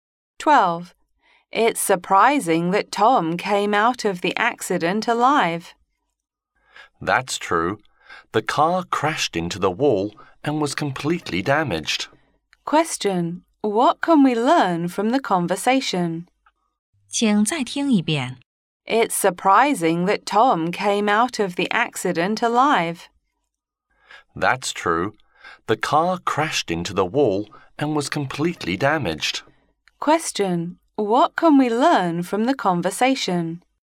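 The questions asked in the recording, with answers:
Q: Question. What can we learn from the conversation?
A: Tom survived a car accident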